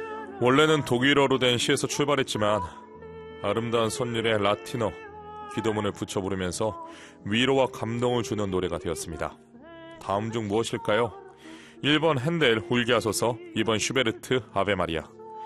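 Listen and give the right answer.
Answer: 2번: 슈베르트 아베마리아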